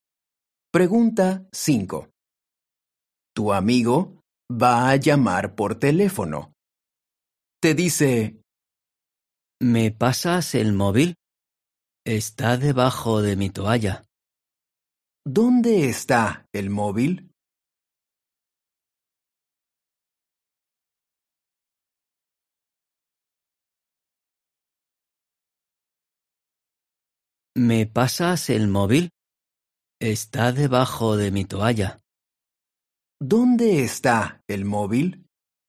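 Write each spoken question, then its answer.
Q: ¿Dónde está el móvil?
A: Debajo de la toalla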